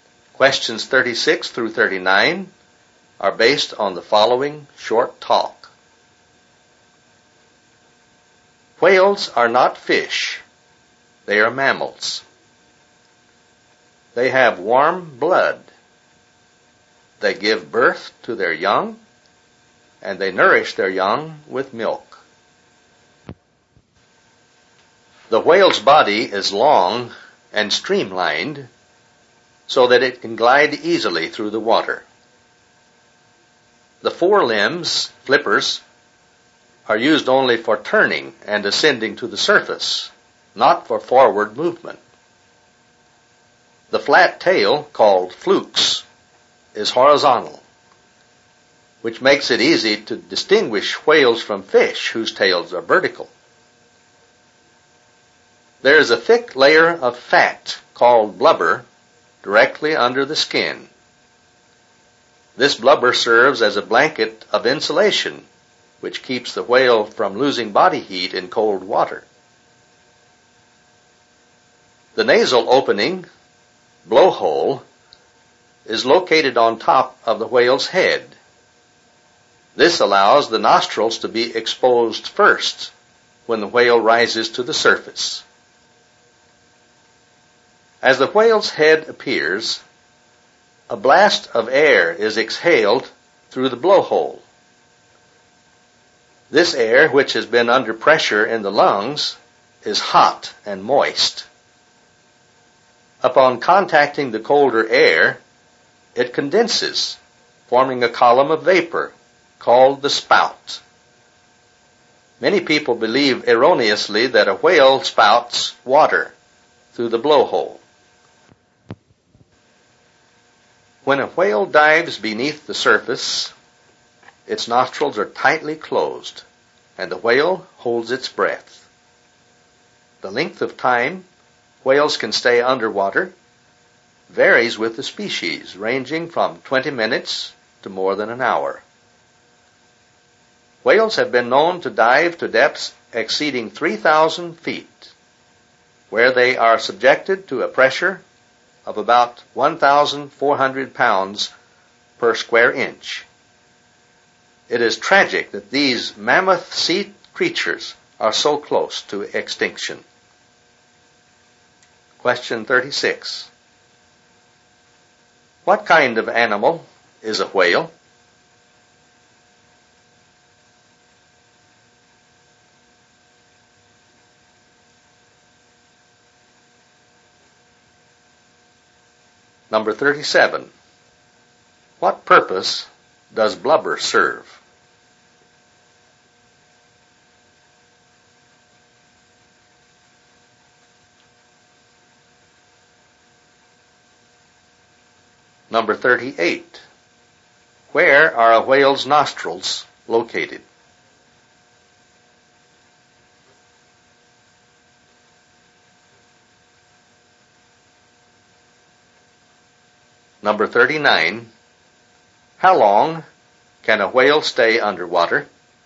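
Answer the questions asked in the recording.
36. A mammal
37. It insulates the whale and keeps it from losing body heat in cold water
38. On top of its head (the blowhole)
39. From 20 minutes to more than an hour, depending on the species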